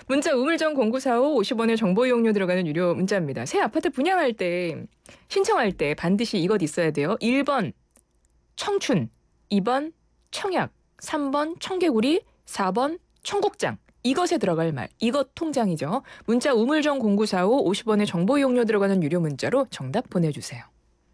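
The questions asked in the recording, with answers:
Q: 새 아파트 분양할 때, 신청할 때 반드시 이것 있어야 돼요. 1번 청춘, 2번 청약, 3번 청개구리, 4번 청국장.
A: 2: 청약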